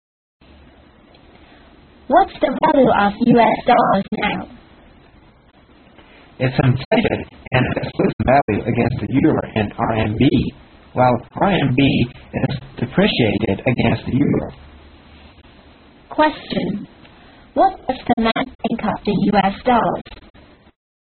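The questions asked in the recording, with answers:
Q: What does the man think of the US dollars?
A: It's inflated and losing value against the euro and RMB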